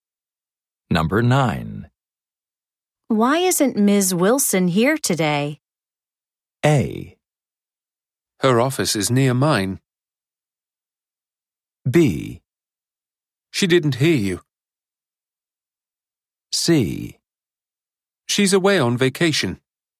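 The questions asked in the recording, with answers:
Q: Why isn't Ms. Wilson here today?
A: C: She's away on vacation.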